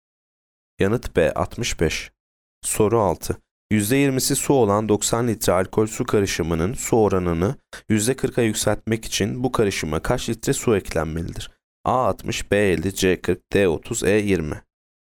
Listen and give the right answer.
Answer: Yanıt D 30.